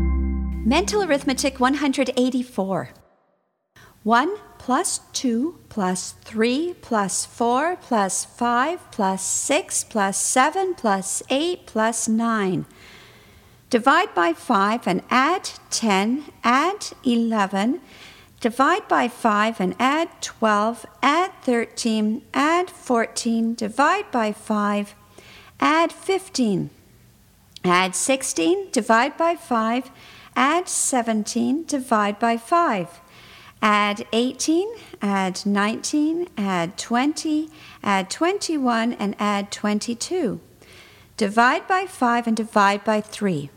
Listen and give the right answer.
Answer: And the answer is 7.